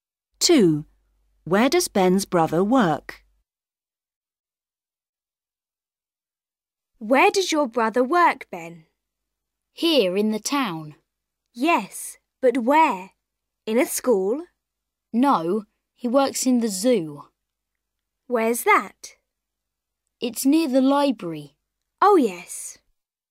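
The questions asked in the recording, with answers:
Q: Where does Ben's brother work?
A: in the zoo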